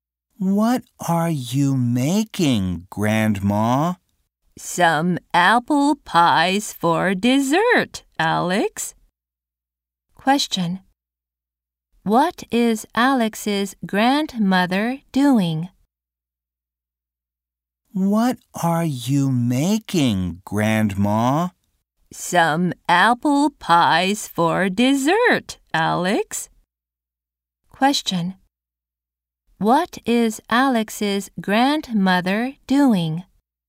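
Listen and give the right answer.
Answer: Making apple pies for dessert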